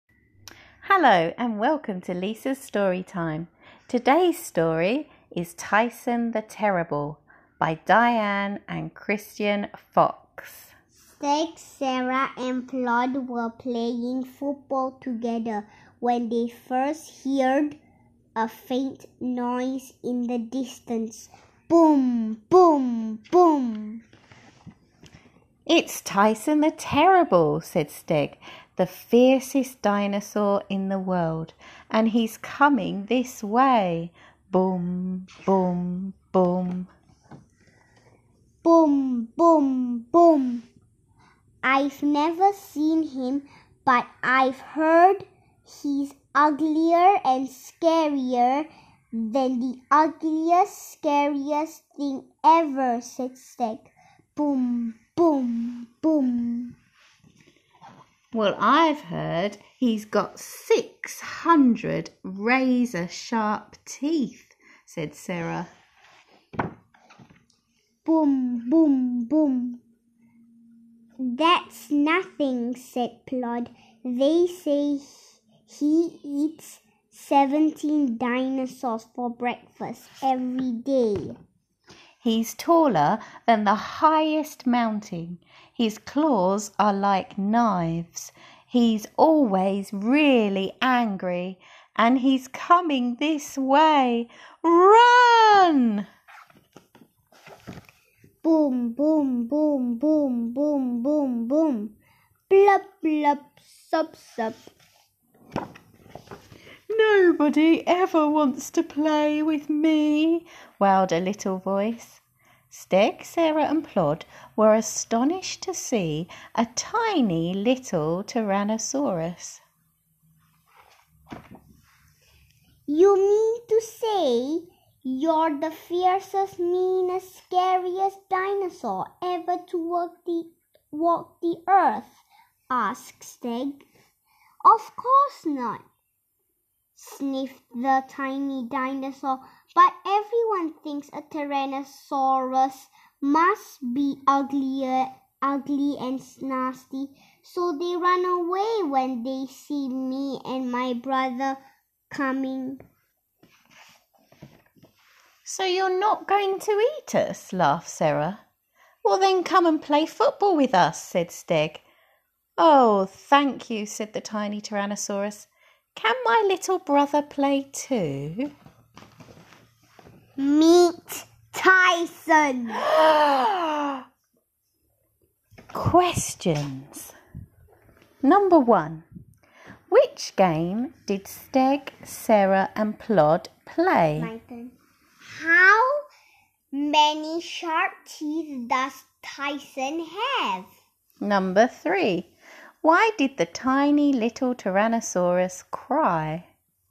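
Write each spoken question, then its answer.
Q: Which game did Sig, Sarah and Plod play?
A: Football

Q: How many sharp teeth does Tyson have?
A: 600

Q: Why did the tiny little Tyrannosaurus cry?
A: Because nobody ever wants to play with him; everyone runs away when they see him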